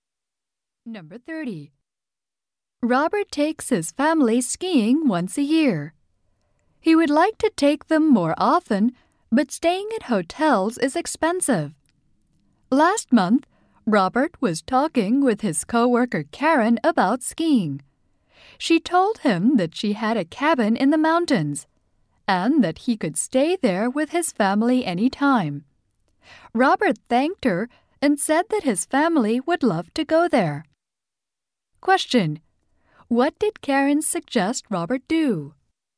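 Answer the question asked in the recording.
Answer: Stay at her mountain cabin with his family.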